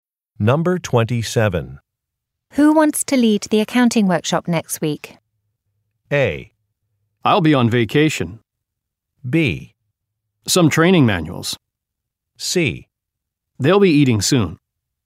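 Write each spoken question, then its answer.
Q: Who wants to lead the accounting workshop next week?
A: A: I'll be on vacation.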